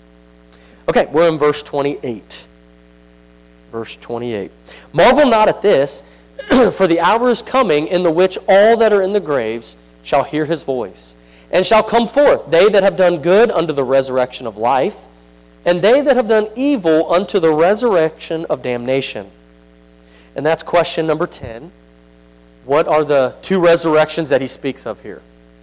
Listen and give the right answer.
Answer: Resurrection of life, and damnation.